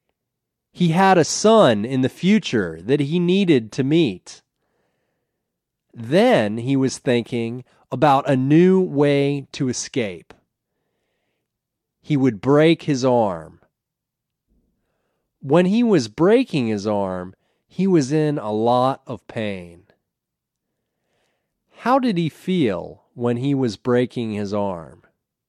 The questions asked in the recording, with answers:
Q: How did he feel when he was breaking his arm?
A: He was in a lot of pain when he was breaking his arm.